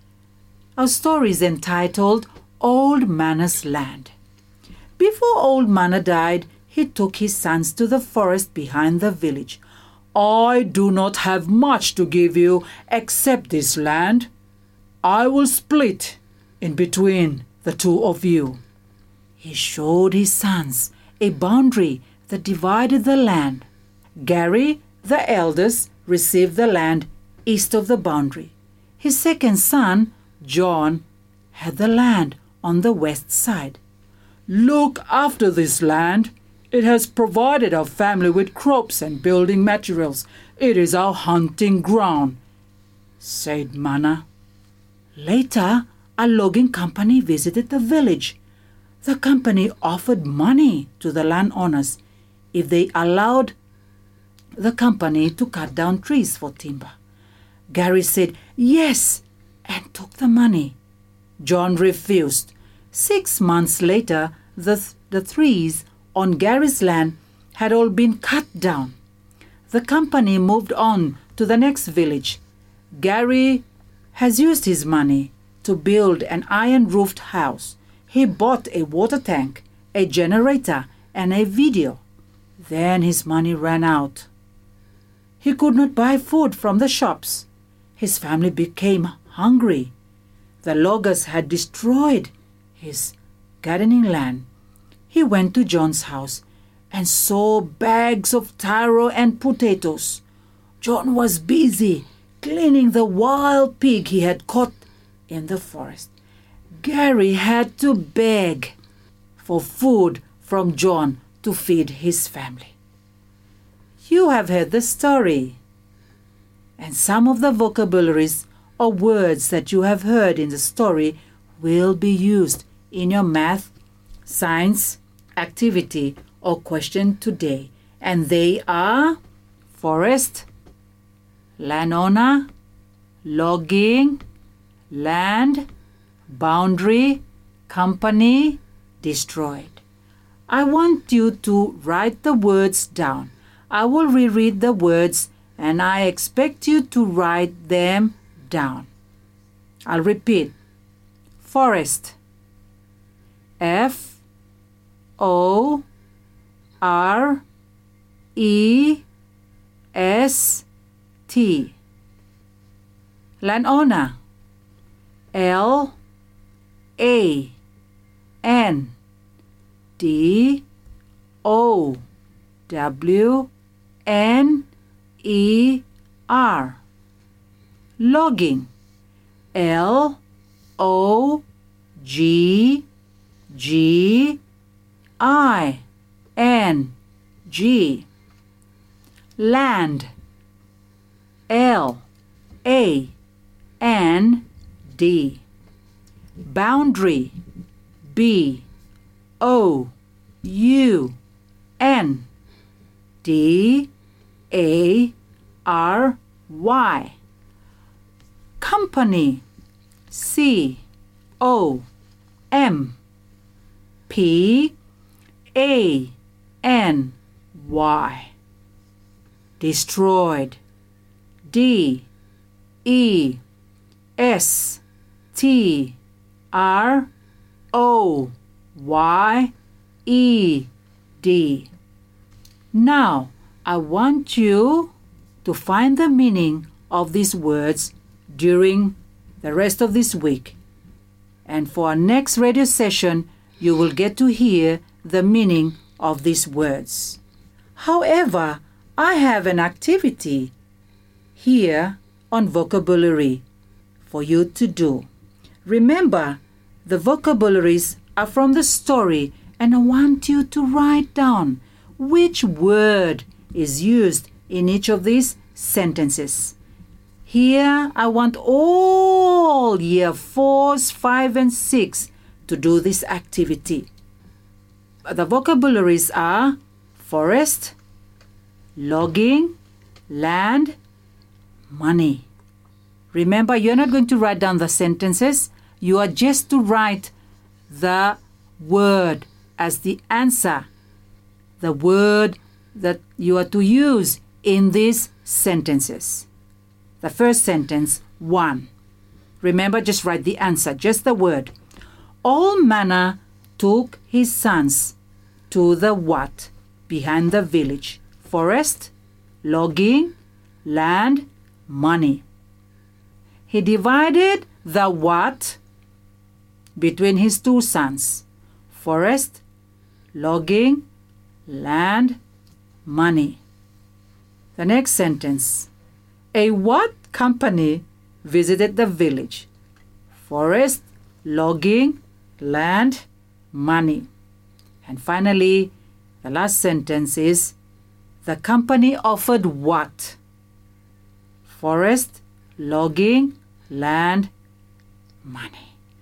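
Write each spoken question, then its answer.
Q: All manner took his sons to the what?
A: forest

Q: He divided the what between his two sons.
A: land

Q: A what company visited the village?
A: logging

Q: the company offered what?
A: money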